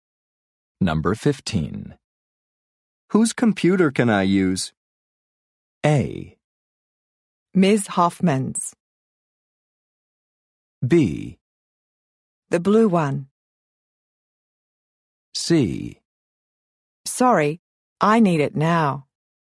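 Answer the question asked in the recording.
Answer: A: Ms. Hoffman's.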